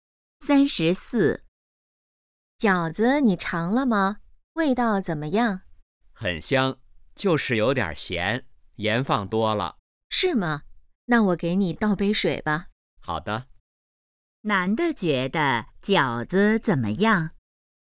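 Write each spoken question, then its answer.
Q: 男的觉得饺子怎么样?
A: 有点咸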